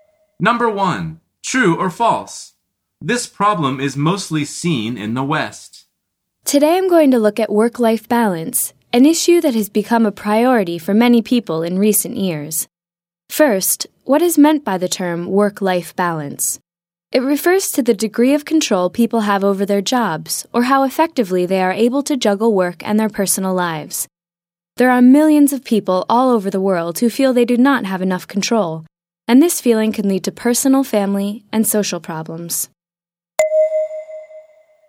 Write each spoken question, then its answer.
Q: This problem is mostly seen in the West.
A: The answer is false.